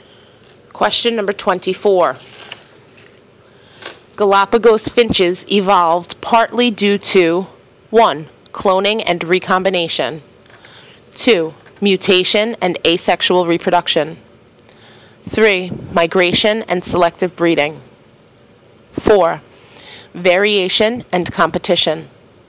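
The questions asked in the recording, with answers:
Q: Galapagos finches evolved partly due to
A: 4: Variation and competition.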